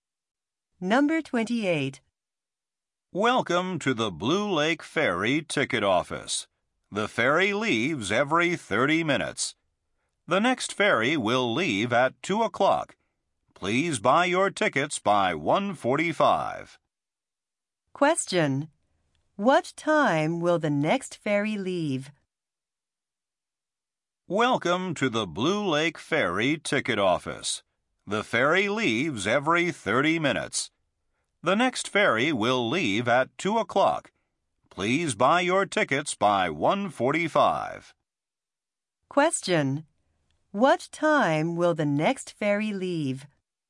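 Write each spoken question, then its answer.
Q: What time will the next ferry leave?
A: At 2 o'clock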